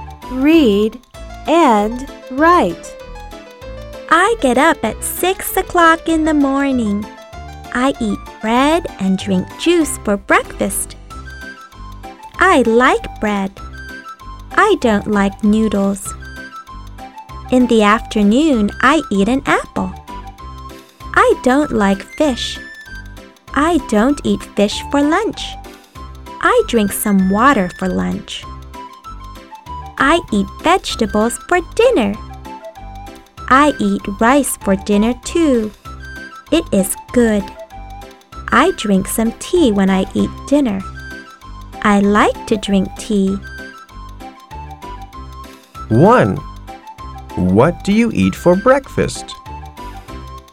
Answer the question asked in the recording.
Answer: I eat bread for breakfast.